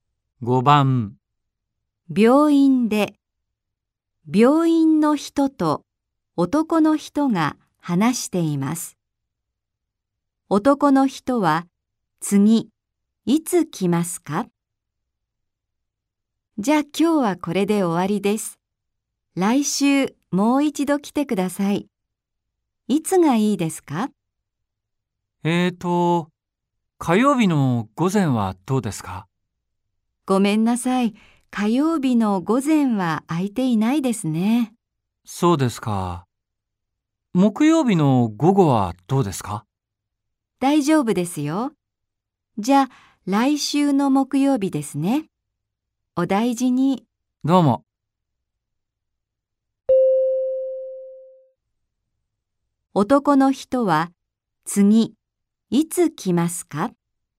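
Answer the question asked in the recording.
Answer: 来週の木曜日の午後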